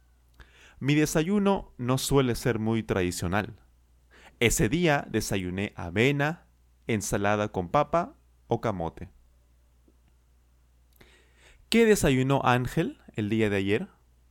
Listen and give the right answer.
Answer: Él desayunó avena, ensalada con papa o camote.